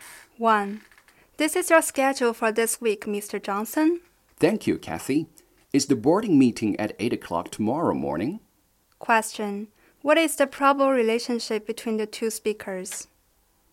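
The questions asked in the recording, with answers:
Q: What is the probable relationship between the two speakers?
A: Boss and secretary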